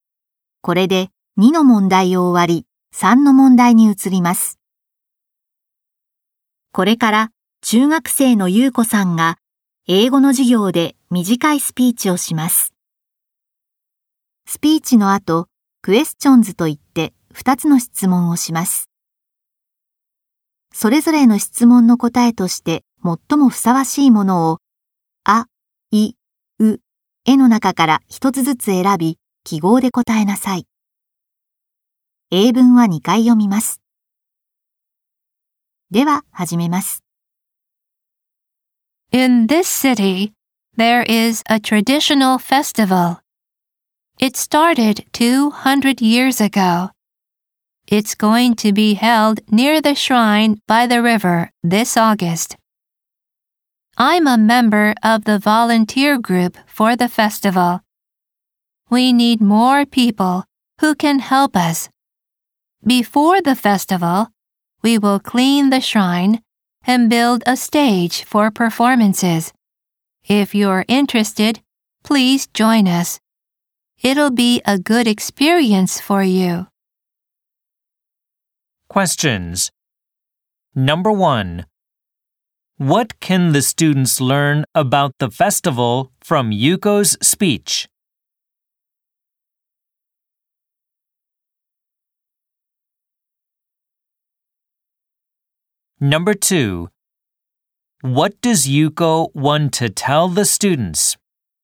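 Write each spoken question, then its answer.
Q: What does Yuko want to tell the students?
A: She wants them to join the festival's volunteer group.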